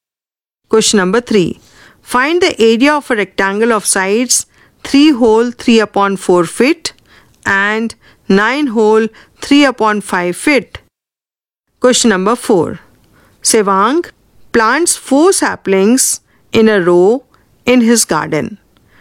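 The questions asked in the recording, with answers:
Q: Find the area of a rectangle of sides 3 whole 3 upon 4 feet and 9 whole 3 upon 5 feet.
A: 36 square feet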